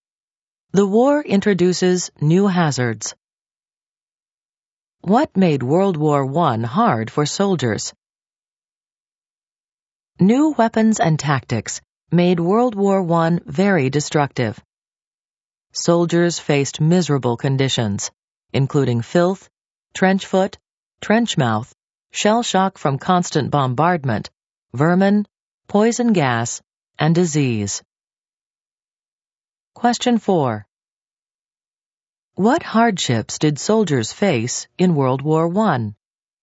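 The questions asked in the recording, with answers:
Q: What hardships did soldiers face in World War I?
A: Filth, trench foot, trench mouth, shell shock, vermin, poison gas and disease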